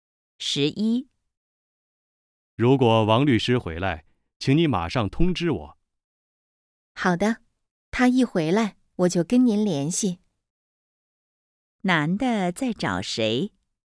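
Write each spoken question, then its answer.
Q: 男的在找谁?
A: 王律师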